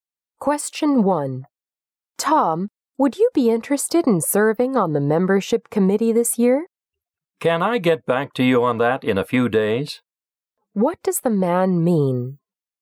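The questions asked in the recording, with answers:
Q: What does the man mean?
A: He needs a few days to think about it before deciding.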